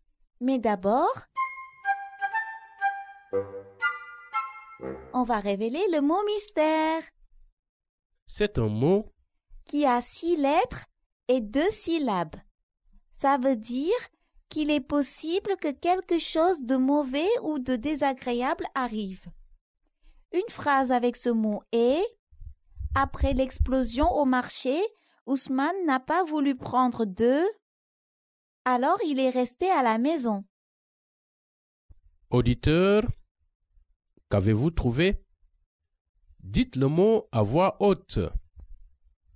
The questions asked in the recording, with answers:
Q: Auditeur, qu'avez-vous trouvé?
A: Le mot mystère est risque.